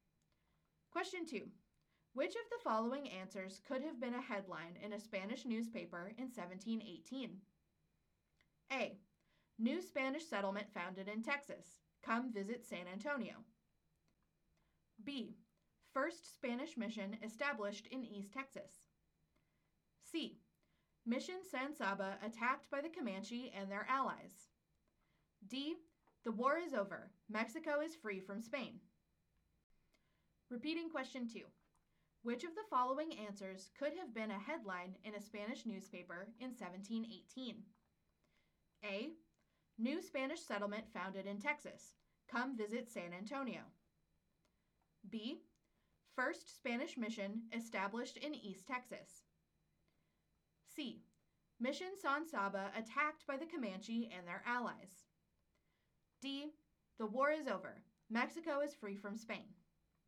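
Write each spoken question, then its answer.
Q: Which of the following answers could have been a headline in a Spanish newspaper in 1718?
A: A: New Spanish settlement founded in Texas. Come visit San Antonio.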